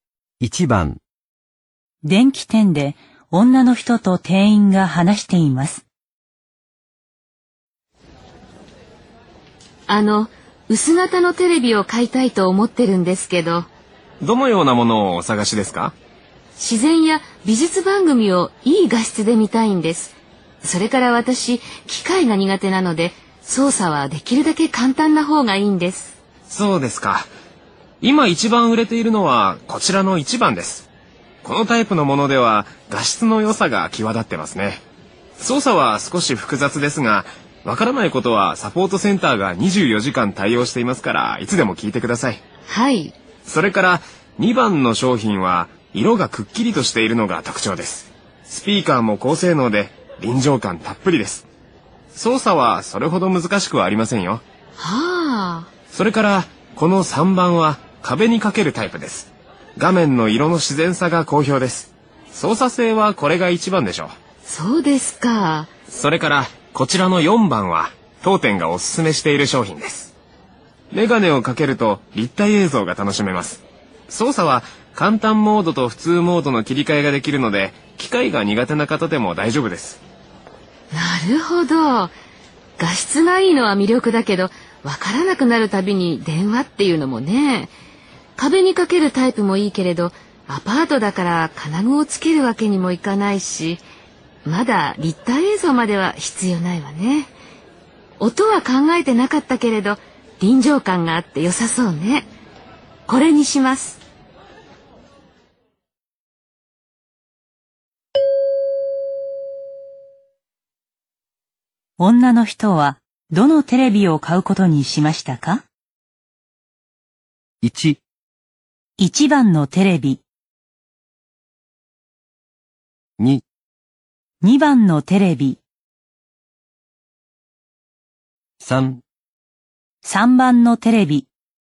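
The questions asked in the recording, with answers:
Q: 女の人は、どのテレビを買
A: 2: 2番のテレビ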